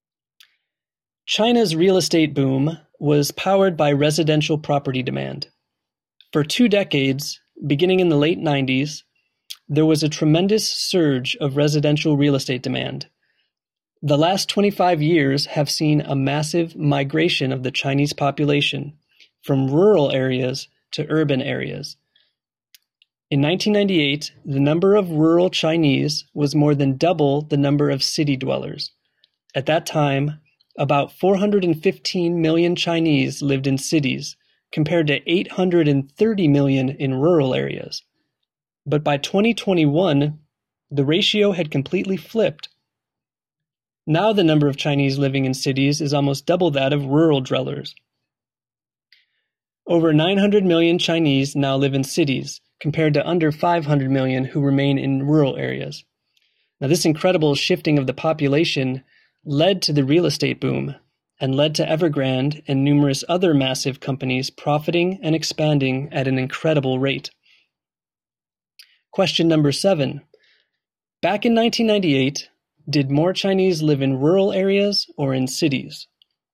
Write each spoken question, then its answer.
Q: Back in 1998, did more Chinese live in rural areas or in cities?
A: In 1998, twice as many Chinese lived in rural areas.